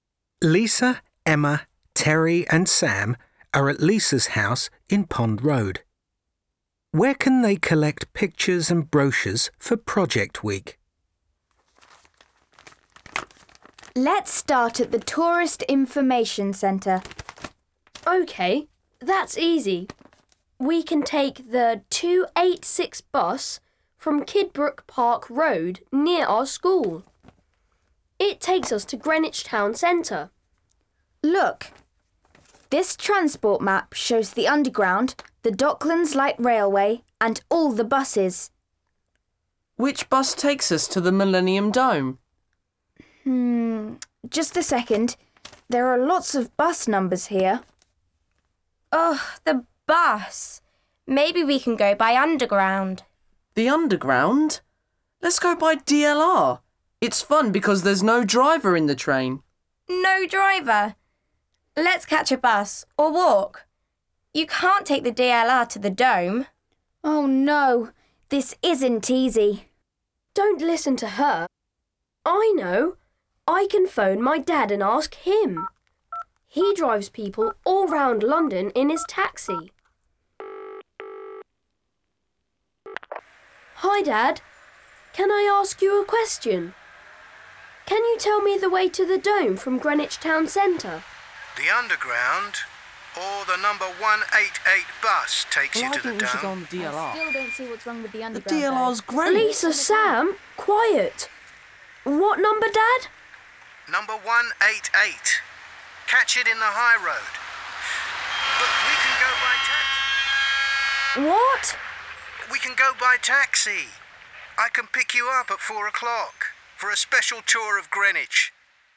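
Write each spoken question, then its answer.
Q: Where can they collect pictures and brochures for Project Week?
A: At the Tourist Information Centre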